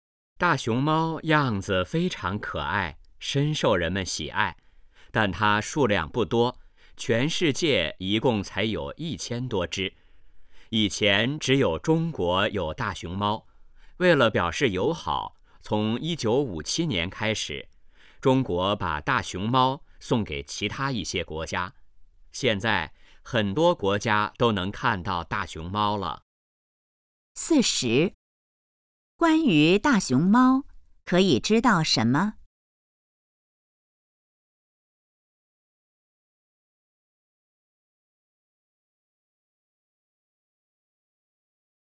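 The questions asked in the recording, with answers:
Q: 中国为什么要送大熊猫出国?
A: 为了表示友好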